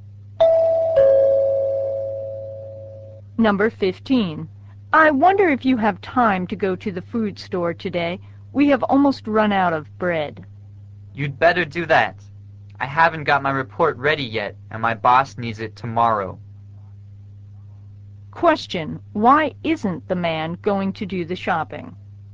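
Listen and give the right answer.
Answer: He has to finish his report for his boss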